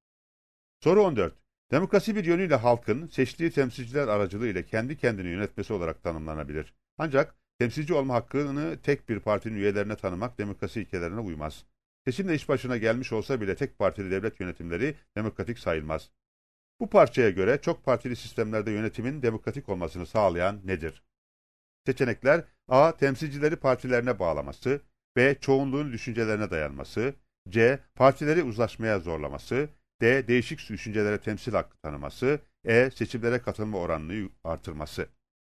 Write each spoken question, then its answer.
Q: Bu parçaya göre çok partili sistemlerde yönetimin demokratik olmasını sağlayan nedir?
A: Yanıt D. Değişik düşüncelere temsil hakkı tanıması.